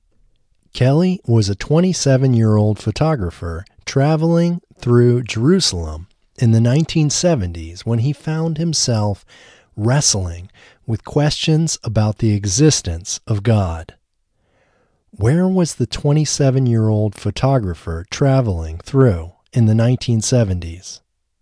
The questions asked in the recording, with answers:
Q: Where was the 27-year-old photographer traveling through in the 1970s?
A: The 27-year-old photographer was traveling through Jerusalem in the 1970s.